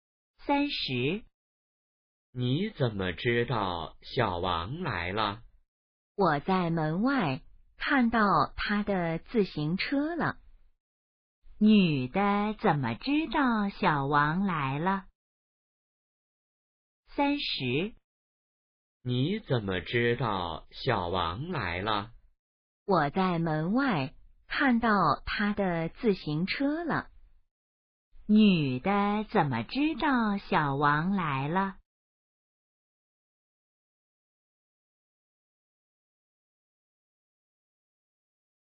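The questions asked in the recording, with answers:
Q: 女的怎么知道小王来了?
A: 在门外看到他的自行车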